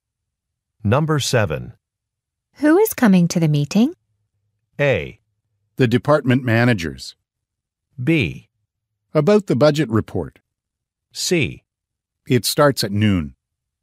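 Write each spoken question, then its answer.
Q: Who is coming to the meeting?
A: A: The department managers.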